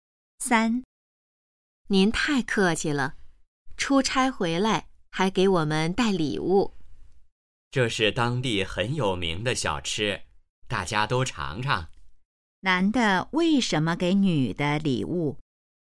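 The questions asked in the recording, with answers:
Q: 男的为什么给女的礼物?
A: 他出差回来,给大家带了当地有名的小吃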